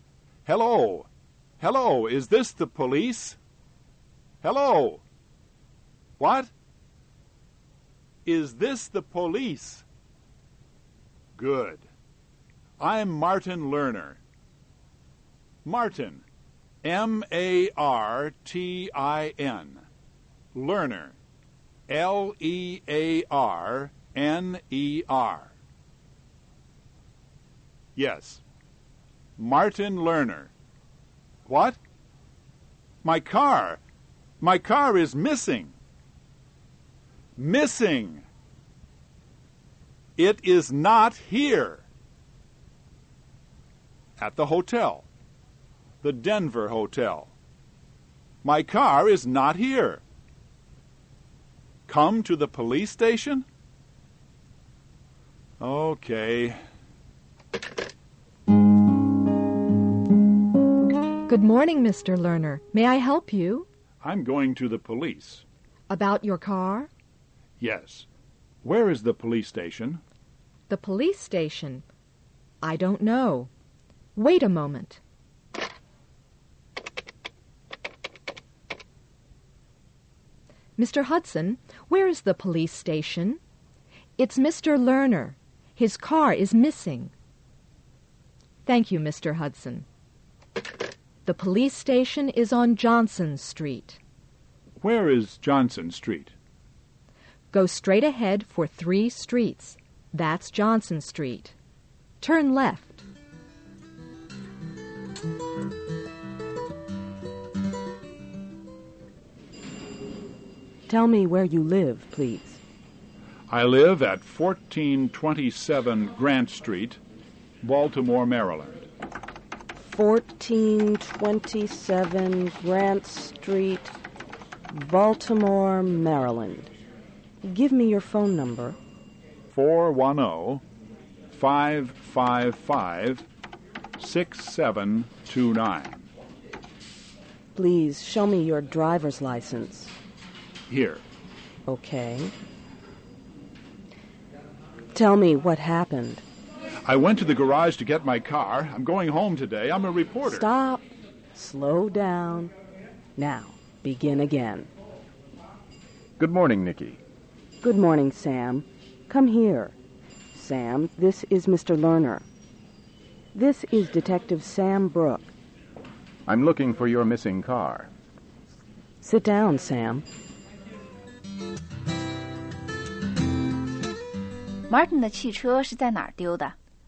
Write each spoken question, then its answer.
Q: Martin 的汽车是在哪儿丢的?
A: 是在 Denver 旅馆不见的。